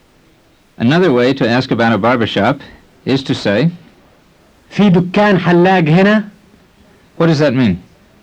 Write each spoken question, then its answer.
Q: What does that mean?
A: It means, is there a barbershop here?